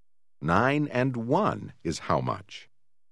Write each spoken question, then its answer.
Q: 9 and 1 is how much?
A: 10.